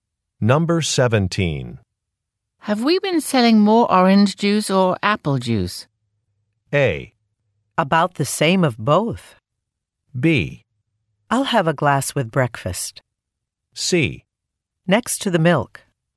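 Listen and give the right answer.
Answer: A: About the same of both.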